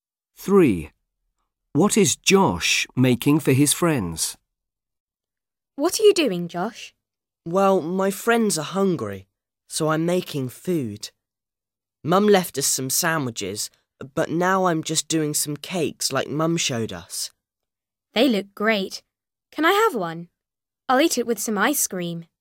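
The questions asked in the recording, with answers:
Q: What is Josh making for his friends?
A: Cakes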